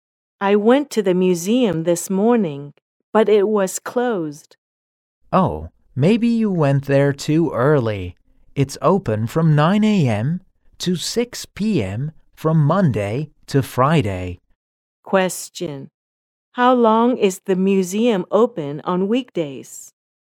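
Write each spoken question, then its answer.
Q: How long is the museum open on weekdays?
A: 9 hours (9 a.m. to 6 p.m.)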